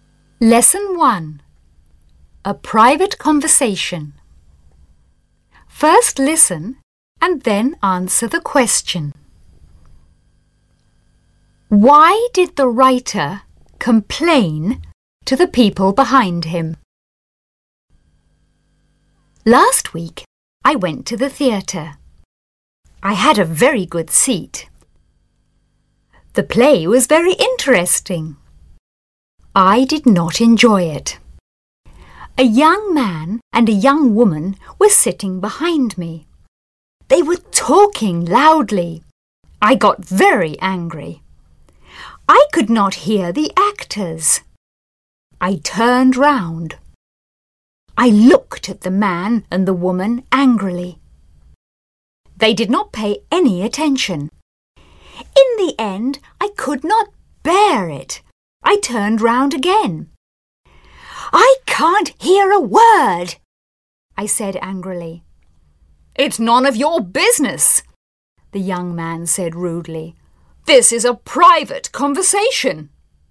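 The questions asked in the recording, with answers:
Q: Why did the writer complain to the people behind him?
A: Because they were talking loudly and he could not hear the actors.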